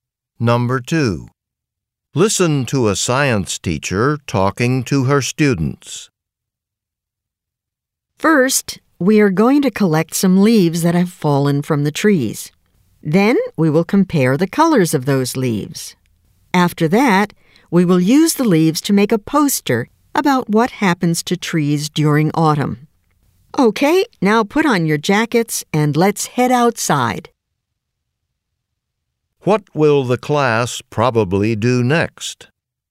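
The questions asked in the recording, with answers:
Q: What will the class probably do next?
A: Go outside to collect fallen leaves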